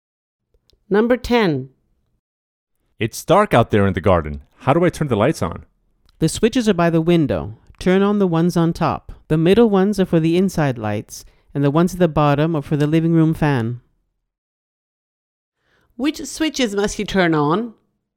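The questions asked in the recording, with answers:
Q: Which switches must you turn on?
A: The ones on top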